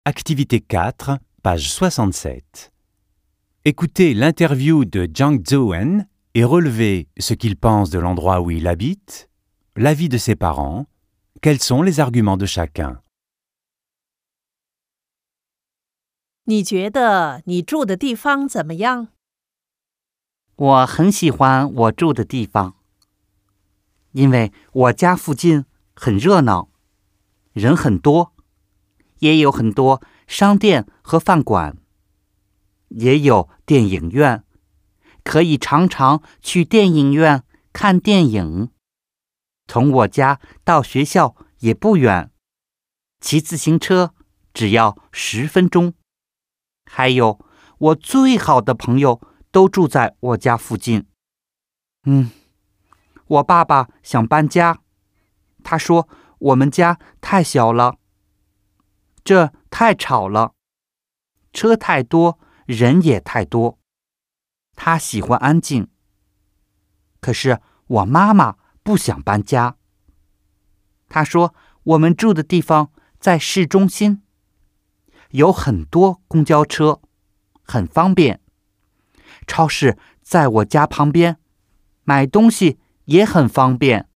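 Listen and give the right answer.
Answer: Il aime son quartier : animé, beaucoup de magasins, de restaurants et un cinéma, l'école à 10 minutes à vélo, ses meilleurs amis habitent près. Son père veut déménager : l'appartement est trop petit, c'est trop bruyant, il y a trop de voitures et de monde, il aime le calme. Sa mère ne veut pas déménager : ils habitent en centre-ville, il y a beaucoup de bus, c'est pratique, le supermarché est à côté.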